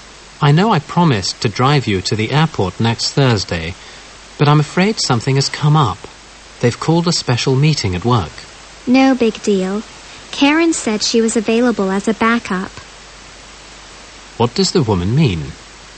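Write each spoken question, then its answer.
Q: What does the woman mean?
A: Karen can drive her to the airport instead.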